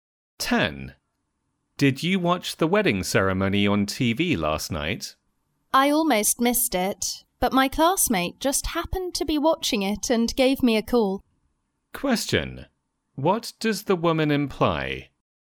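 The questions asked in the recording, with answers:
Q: What does the woman imply?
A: She watched the wedding ceremony thanks to her classmate's call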